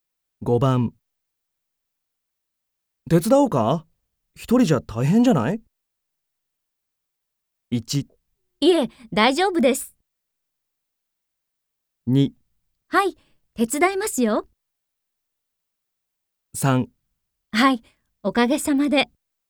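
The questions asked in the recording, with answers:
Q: 手伝おうか?一人じゃ大変じゃない?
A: 1: いえ、大丈夫です。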